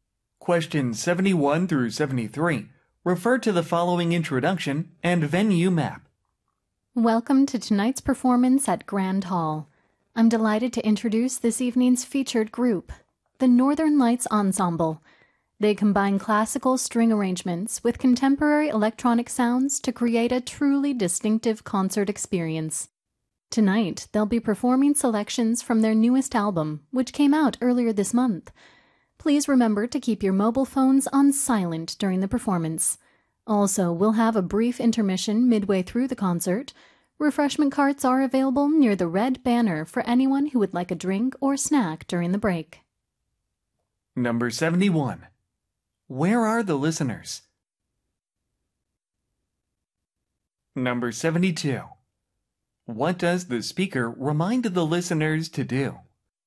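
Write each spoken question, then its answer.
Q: Where are the listeners?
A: At a concert at Grand Hall

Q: What does the speaker remind the listeners to do?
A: Keep their mobile phones on silent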